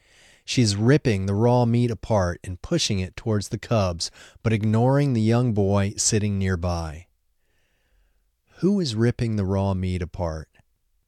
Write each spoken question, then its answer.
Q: Who is ripping the raw meat apart?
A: The mother wolf is ripping the raw meat apart.